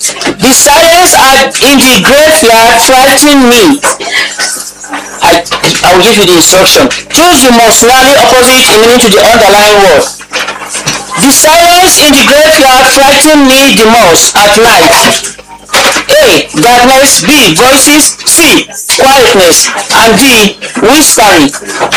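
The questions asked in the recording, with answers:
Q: Choose the most nearly opposite in meaning to the underlying word.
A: B: Voices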